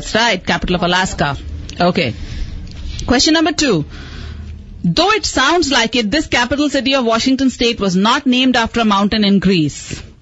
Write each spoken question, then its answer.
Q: Though it sounds like it, this capital city of Washington State was not named after a mountain in Greece.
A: Olympia.